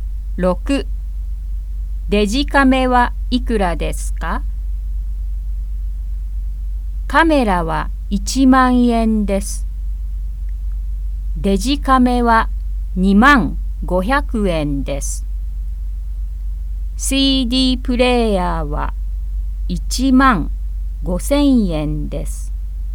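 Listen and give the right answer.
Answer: 2万500円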